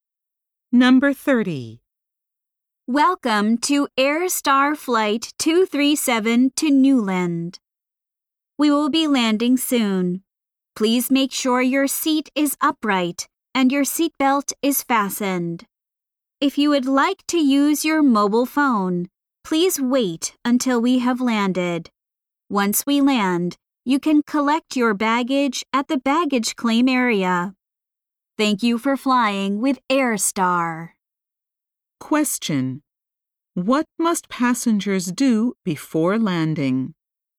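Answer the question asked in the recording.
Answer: Put seats upright and fasten seatbelts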